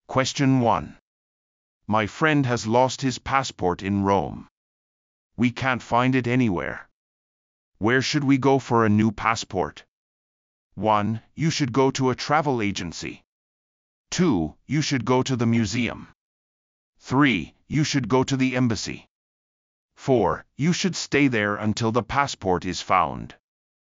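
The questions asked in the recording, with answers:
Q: Where should we go for a new passport?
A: 3: You should go to the embassy.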